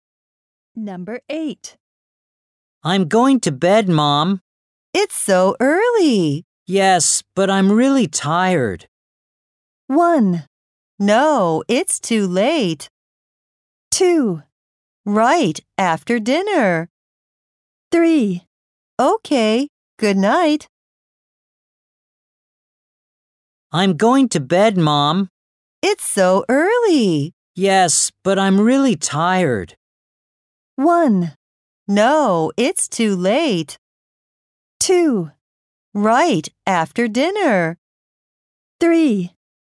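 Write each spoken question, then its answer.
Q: Yes, but I'm really tired.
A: 3: Okay, good night.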